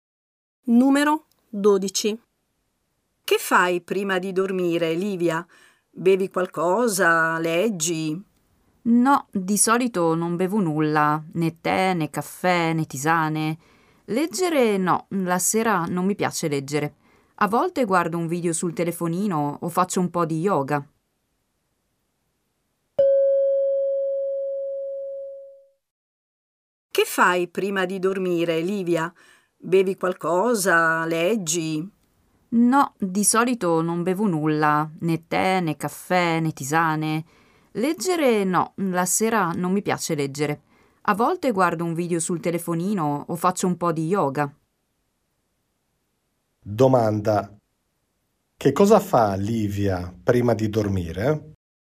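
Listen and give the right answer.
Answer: A volte guarda un video sul telefonino o fa un po' di yoga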